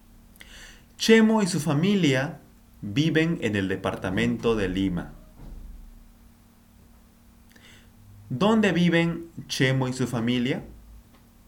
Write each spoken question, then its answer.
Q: ¿Dónde viven Chemo y su familia?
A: Ellos viven en el departamento de Lima.